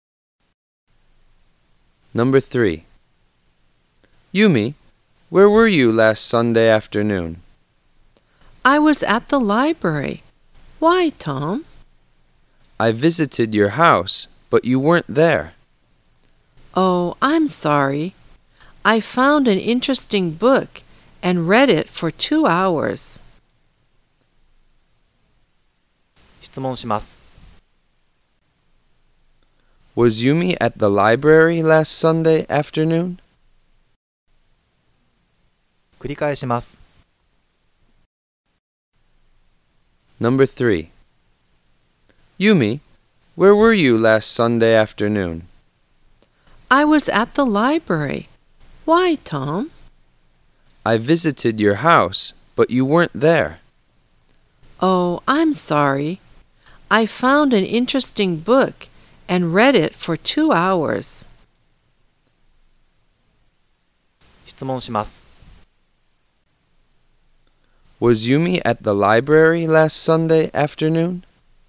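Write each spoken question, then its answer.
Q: Was Yumi at the library last Sunday afternoon?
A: Yes, she was.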